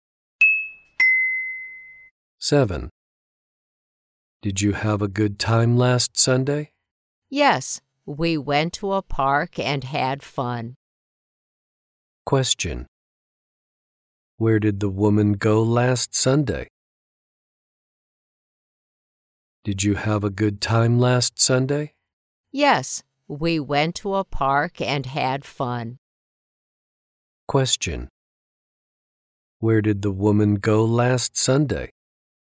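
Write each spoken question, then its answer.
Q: Where did the woman go last Sunday?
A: To a park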